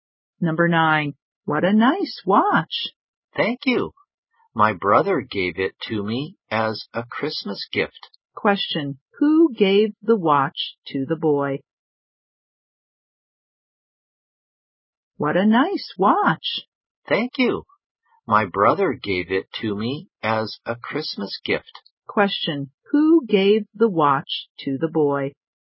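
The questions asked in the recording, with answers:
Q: Question, who gave the watch to the boy?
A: His brother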